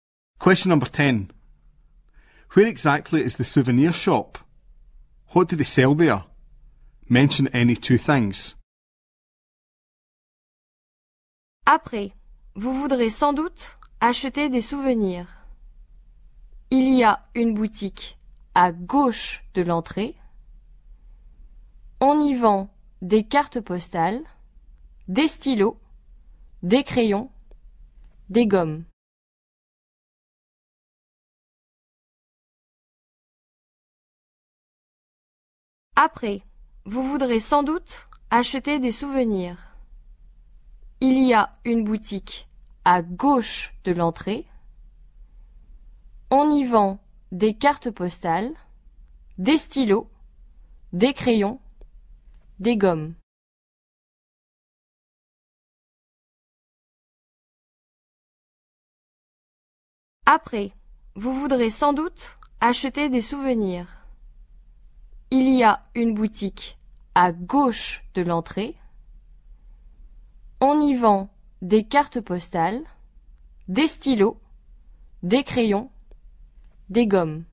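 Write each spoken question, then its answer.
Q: Where exactly is the souvenir shop?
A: To the left of the entrance

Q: What do they sell there? Mention any two things.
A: Postcards, pens, pencils, rubbers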